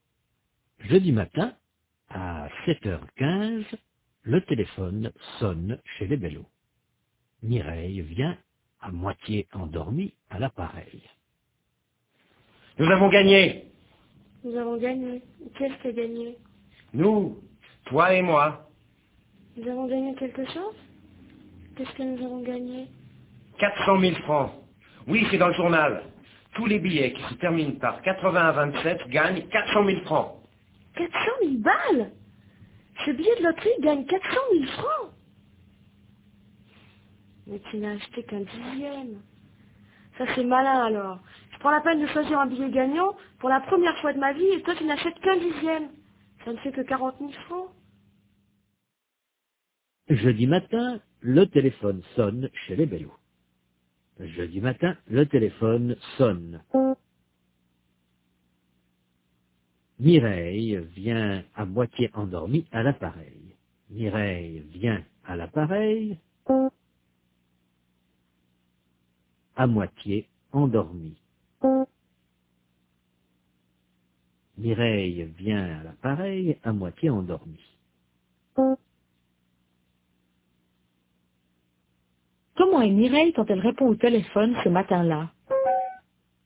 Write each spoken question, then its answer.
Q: Comment est Mireille quand elle répond au téléphone ce matin-là?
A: Elle est à moitié endormie.